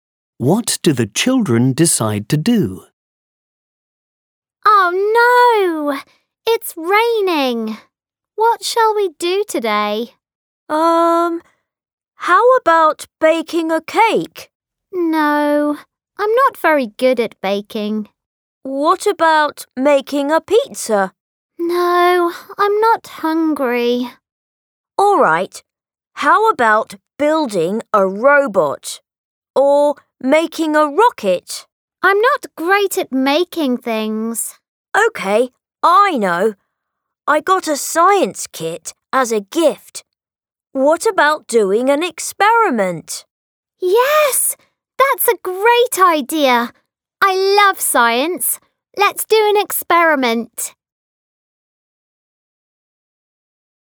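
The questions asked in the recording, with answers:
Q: What do the children decide to do?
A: Do a science experiment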